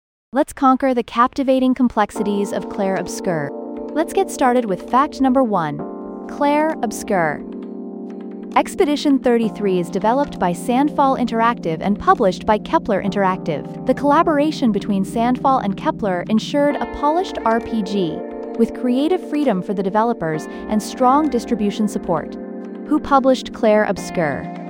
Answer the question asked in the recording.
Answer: Correct answer, Kepler Interactive.